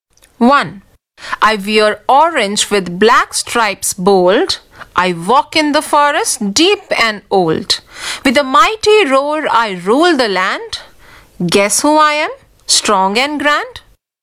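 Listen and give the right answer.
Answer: The tiger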